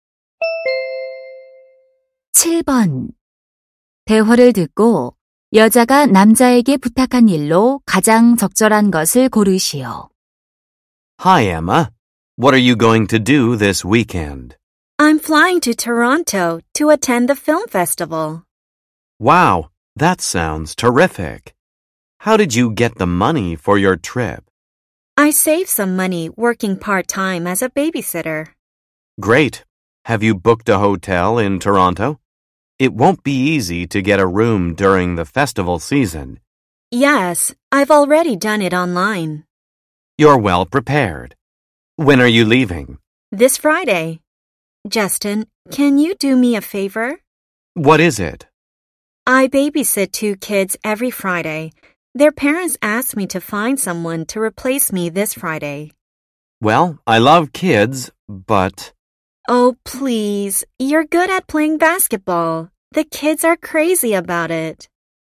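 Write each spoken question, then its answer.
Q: 대화를 듣고 여자가 남자에게 부탁한 일로 가장 적절한 것을 고르시오.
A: 금요일에 대신 아이들 돌보기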